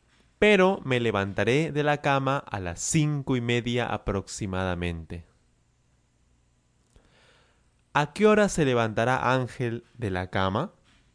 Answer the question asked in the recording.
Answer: Él se levantará de la cama a las cinco y media aproximadamente.